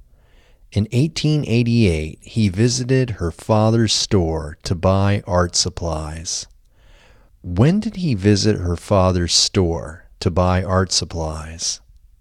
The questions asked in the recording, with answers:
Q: When did he visit her father's store to buy art supplies?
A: He visited her father's store to buy art supplies in 1888.